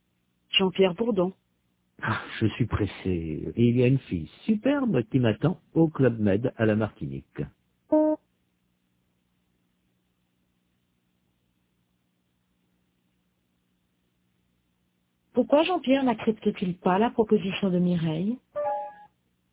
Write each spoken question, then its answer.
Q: Pourquoi Jean-Pierre n'accepte-t-il pas la proposition de Mireille?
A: Parce qu'il est pressé.